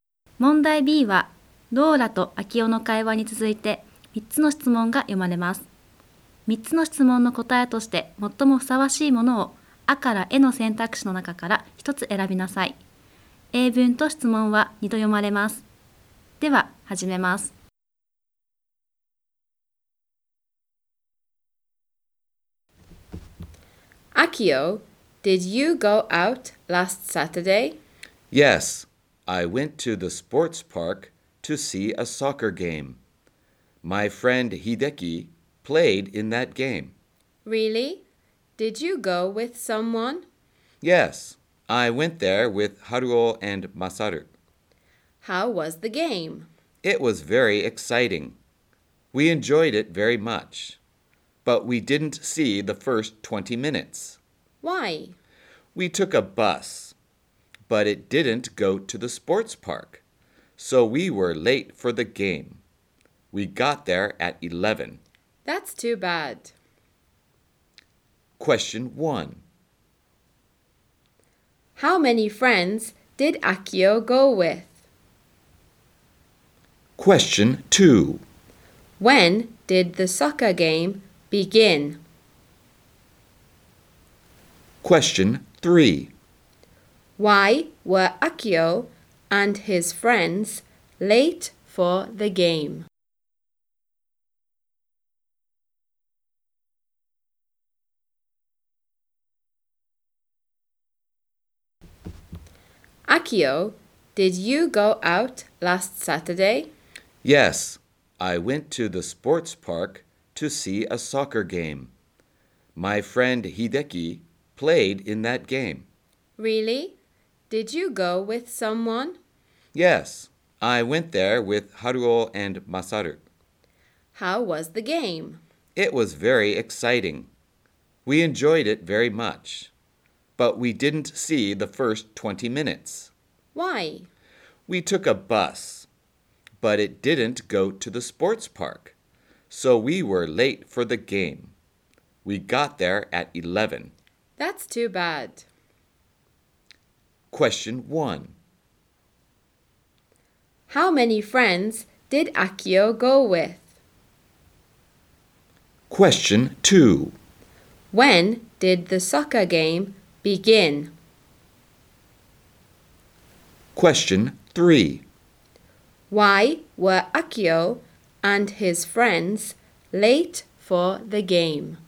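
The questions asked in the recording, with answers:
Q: How many friends did Akio go with?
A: Two

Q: When did the soccer game begin?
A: At 10:40

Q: Why were Akio and his friends late for the game?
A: Because the bus they took didn't go to the sports park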